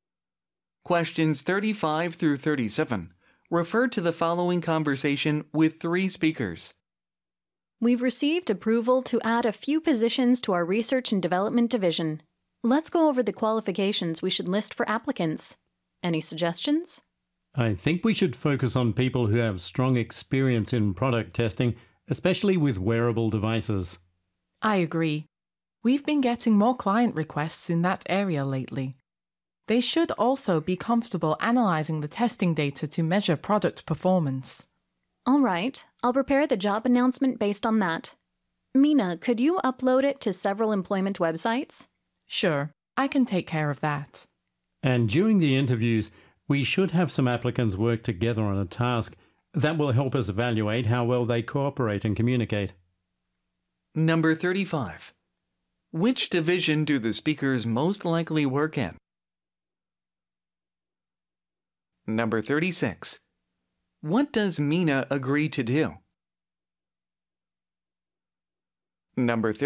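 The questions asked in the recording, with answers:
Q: Which division do the speakers most likely work in?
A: Research and development

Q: What does Mina agree to do?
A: Upload the job announcement to employment websites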